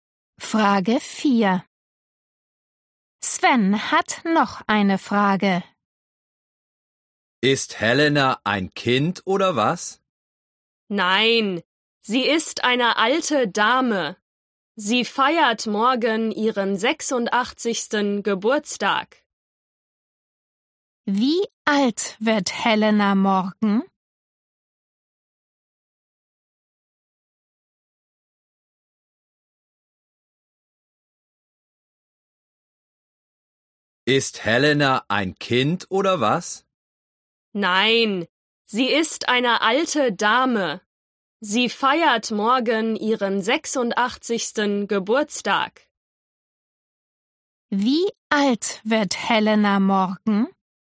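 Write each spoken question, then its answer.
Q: Wie alt wird Helena morgen?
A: 86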